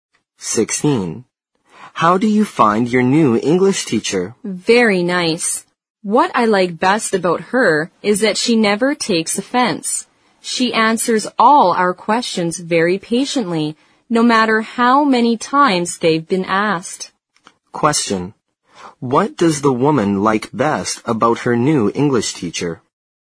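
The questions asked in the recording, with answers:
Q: What does the woman like best about her new English teacher?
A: She never takes offense and answers questions patiently.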